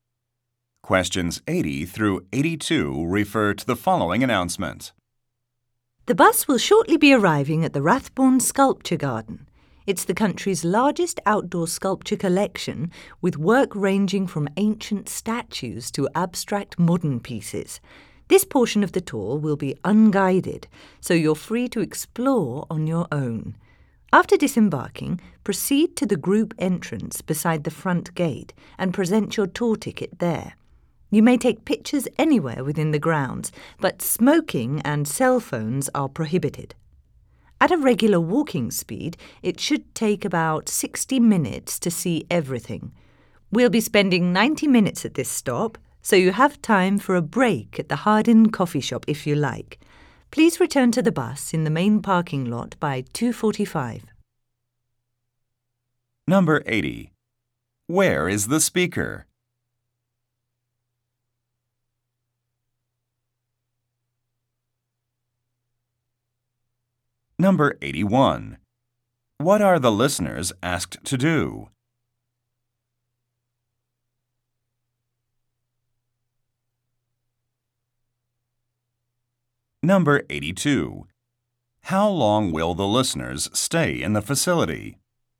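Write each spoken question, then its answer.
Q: Where is the speaker?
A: On a tour bus

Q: How long will the listeners stay in the facility?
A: 90 minutes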